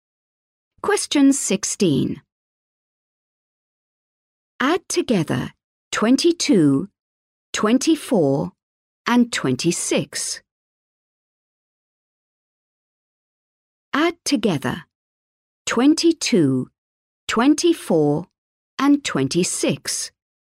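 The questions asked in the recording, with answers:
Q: Add together 22, 24, and 26.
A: 72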